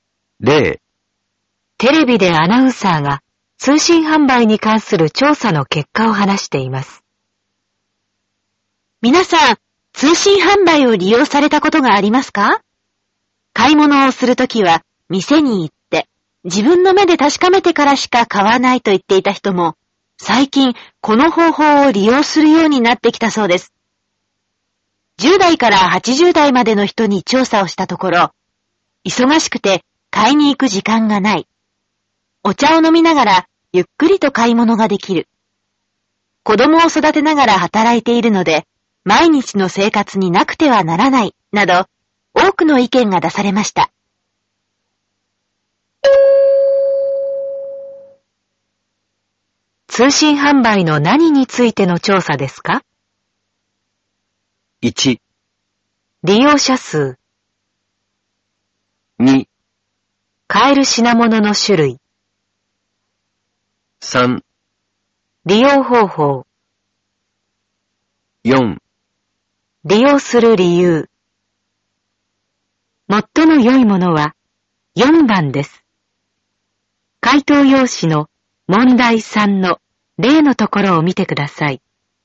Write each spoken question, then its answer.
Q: 通信販売の何についての調査ですか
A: 最も良いものは4番です。